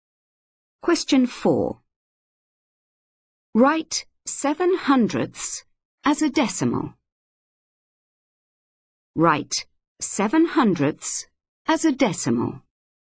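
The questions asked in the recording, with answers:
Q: Write 7/100 as a decimal.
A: 0.07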